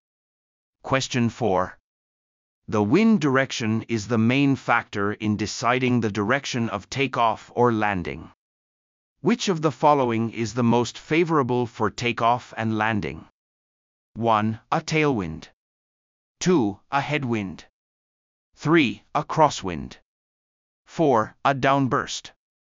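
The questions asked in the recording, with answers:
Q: Which of the following is the most favorable for takeoff and landing?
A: 2: A headwind.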